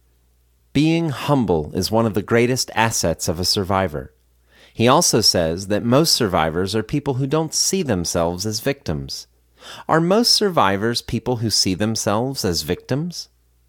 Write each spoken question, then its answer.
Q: Are most survivors people who see themselves as victims?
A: No, most survivors are people who don't see themselves as victims.